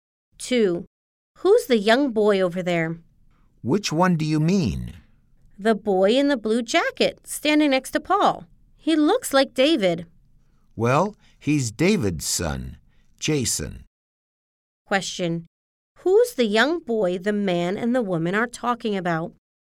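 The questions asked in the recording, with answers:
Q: Who's the young boy the man and the woman are talking about?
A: Jason, David's son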